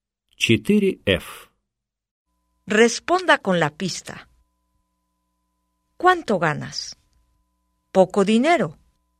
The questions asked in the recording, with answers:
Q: ¿Cuánto ganas? ¿Poco dinero?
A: Gano poco dinero.